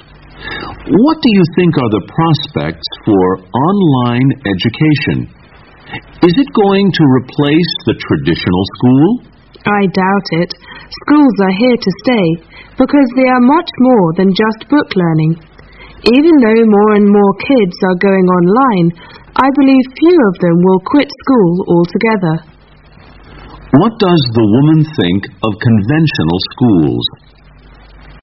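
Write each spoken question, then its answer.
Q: What does the woman think of conventional schools?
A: They will not be replaced by online education; they are here to stay because they offer more than book learning.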